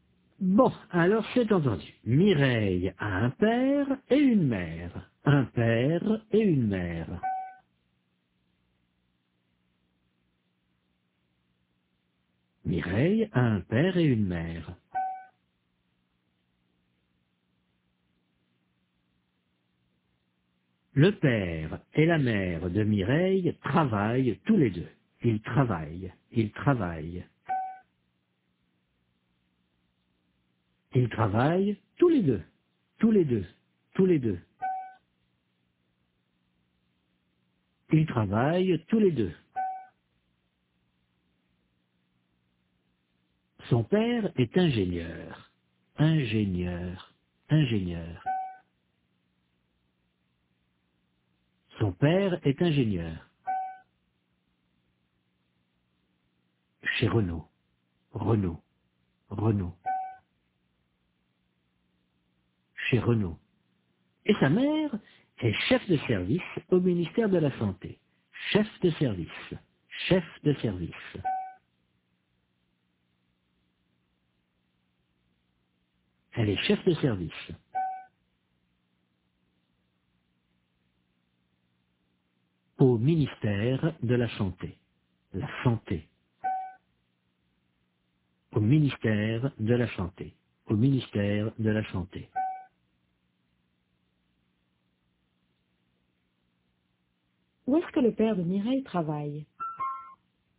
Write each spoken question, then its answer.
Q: Où est-ce que le père de Mireille travaille ?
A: Chez Renault.